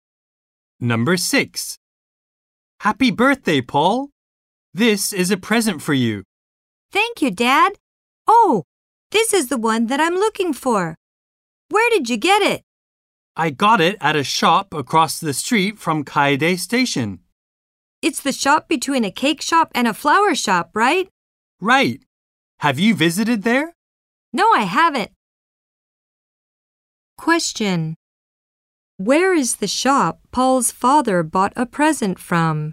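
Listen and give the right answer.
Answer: Across the street from Kaede Station, between a cake shop and a flower shop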